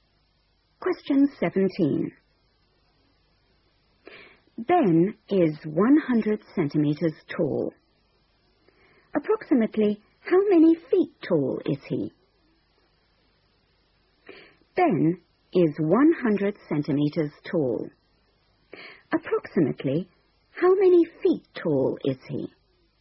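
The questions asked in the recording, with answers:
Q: Approximately how many feet tall is he?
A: about 3 feet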